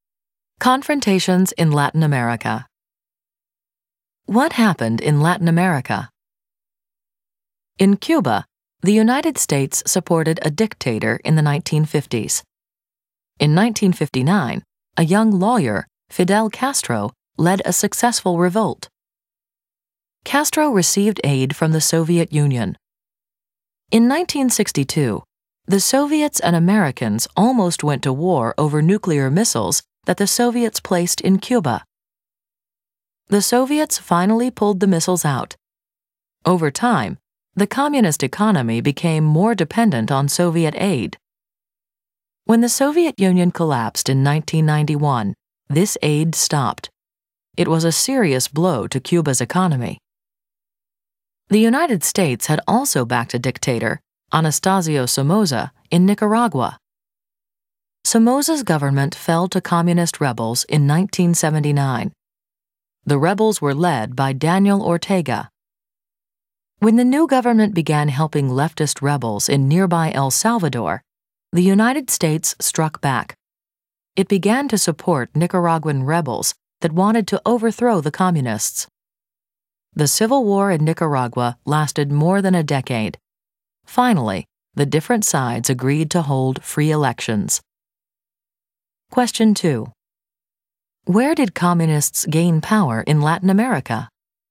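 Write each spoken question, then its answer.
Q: Where did communists gain power in Latin America?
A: Cuba and Nicaragua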